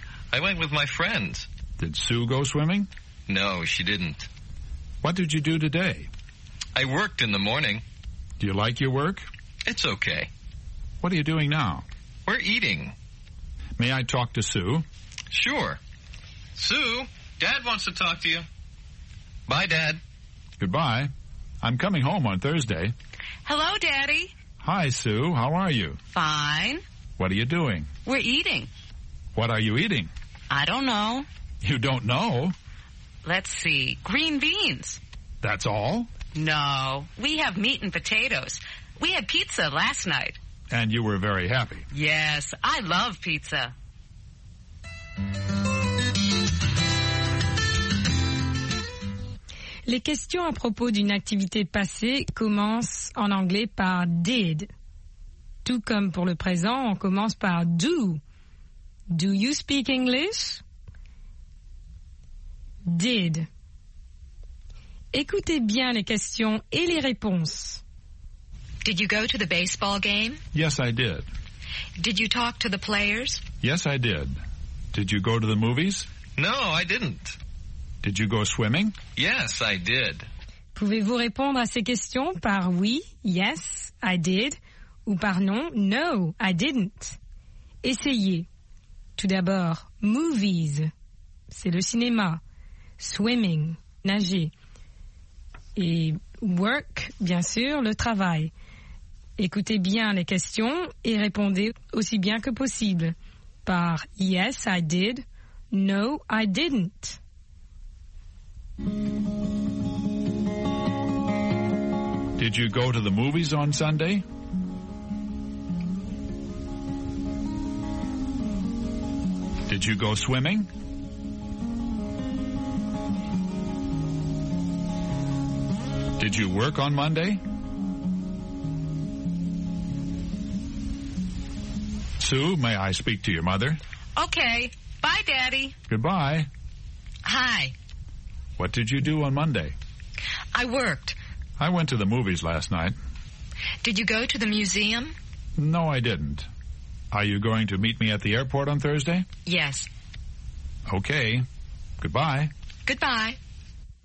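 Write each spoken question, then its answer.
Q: Did you go to the movies on Sunday?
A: No, I didn't.

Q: Did you go swimming?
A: Yes, I did.

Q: Did you work on Monday?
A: Yes, I did.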